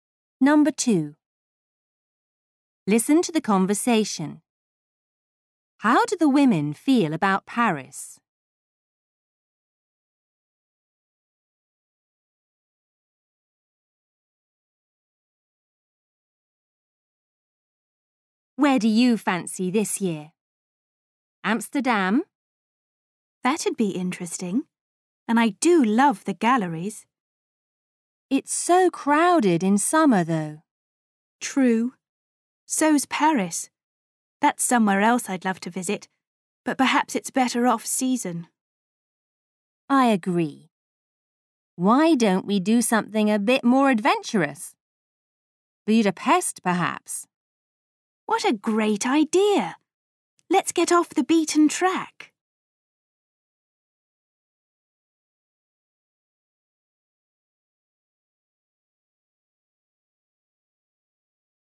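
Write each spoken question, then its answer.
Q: How do the women feel about Paris?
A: They would like to visit but it's better off season (too crowded in summer)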